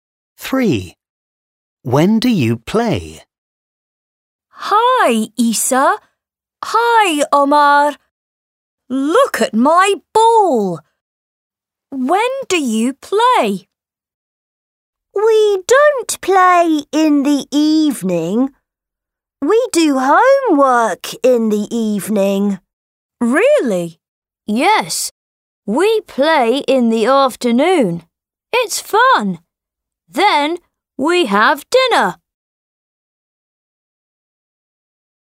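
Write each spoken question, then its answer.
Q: When do you play?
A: In the afternoon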